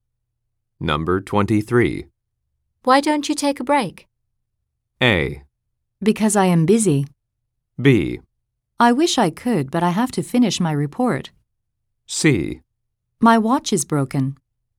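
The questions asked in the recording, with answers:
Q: Why don't you take a break?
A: B: I wish I could, but I have to finish my report.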